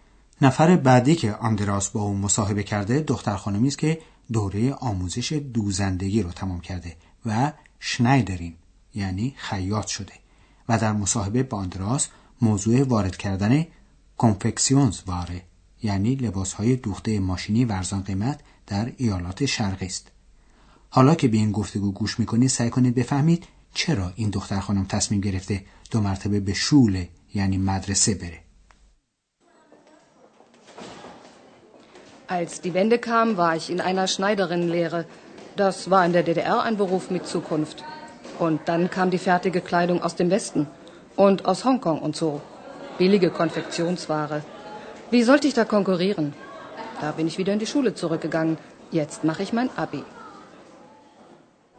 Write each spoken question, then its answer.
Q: سعی کنید بفهمید چرا این دختر خانم تصمیم گرفته دو مرتبه به شوله یعنی مدرسه بره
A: او نمیتونه با فروشگاه های این لباس ها رقابت کنه.